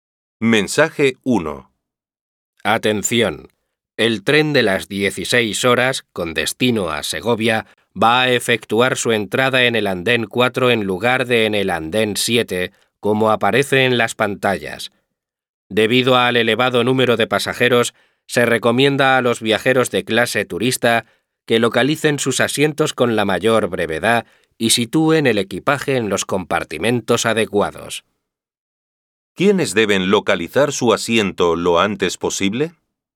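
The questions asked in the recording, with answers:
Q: ¿Quiénes deben localizar su asiento lo antes posible?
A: Los viajeros de clase turista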